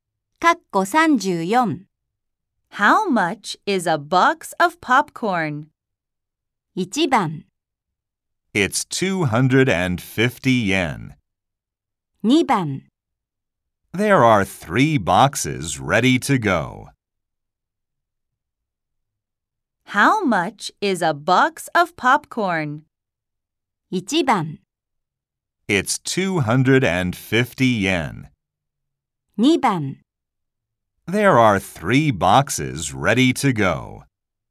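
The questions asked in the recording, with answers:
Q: How much is a box of popcorn?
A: 1: It's 250 yen.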